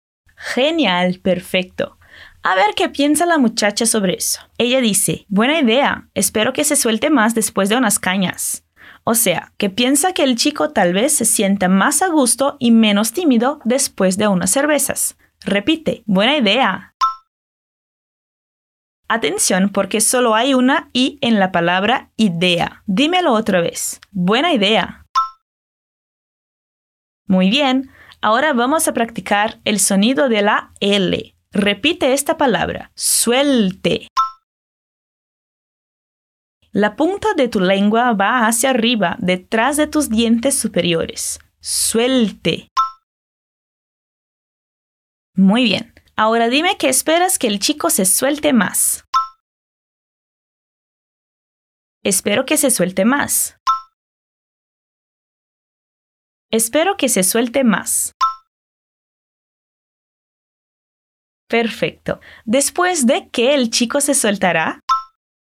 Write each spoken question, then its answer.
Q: ¿Después de qué el chico se soltará?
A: Después de unas cañas.